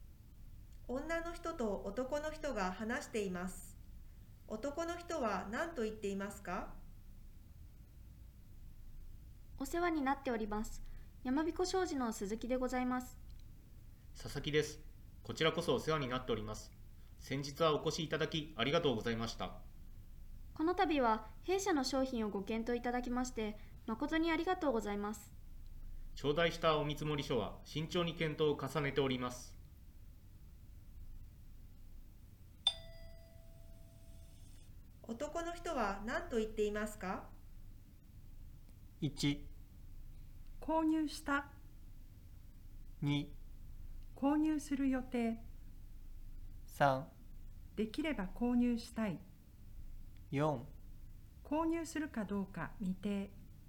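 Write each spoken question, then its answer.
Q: 男の人は何と言っていますか?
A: 4: 購入するかどうか未定。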